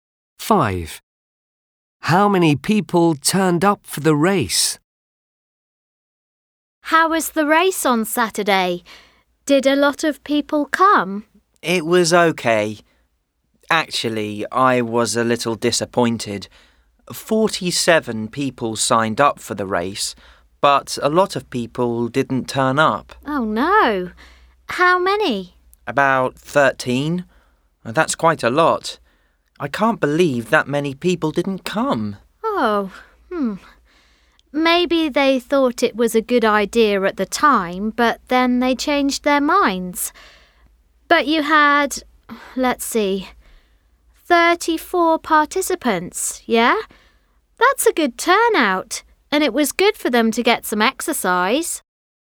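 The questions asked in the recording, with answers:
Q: How many people turned up for the race?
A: 34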